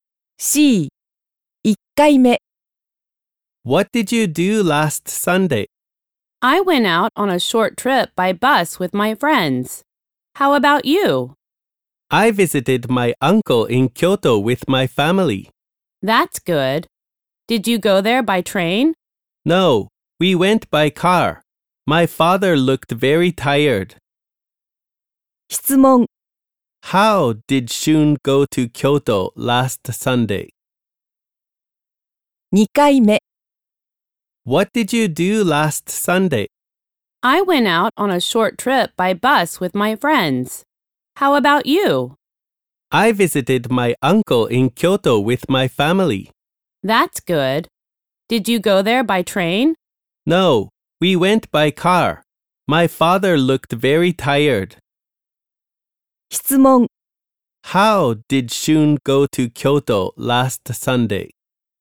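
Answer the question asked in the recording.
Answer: By car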